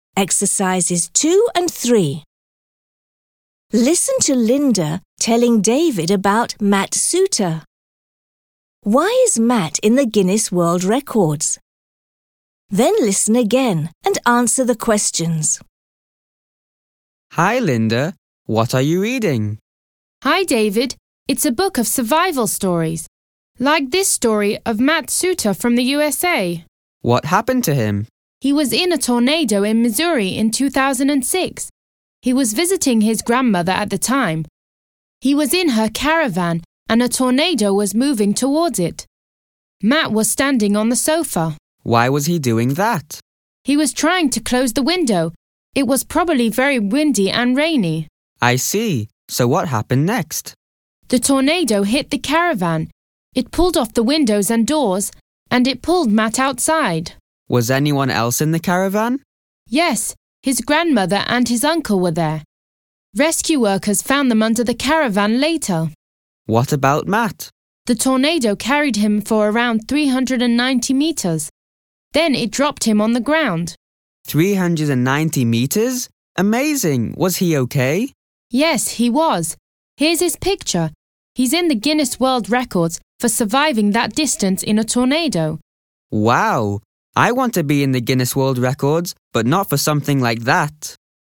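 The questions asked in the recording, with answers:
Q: Why is Matt in the Guinness World Records?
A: For surviving being carried about 390 metres by a tornado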